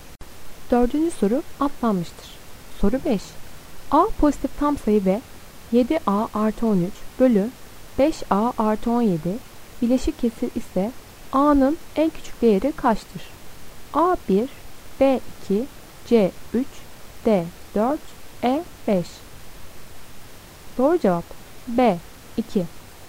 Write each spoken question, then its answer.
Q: A pozitif tam sayı ve 7A artı 13 bölü 5A artı 17 bileşik kesir ise A'nın en küçük değeri kaçtır?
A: Doğru cevap B 2.